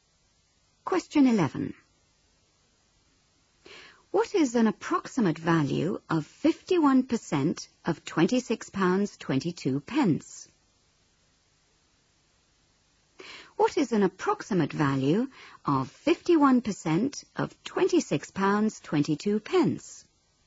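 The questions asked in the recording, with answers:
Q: What is an approximate value of 51% of £26.22?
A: About £13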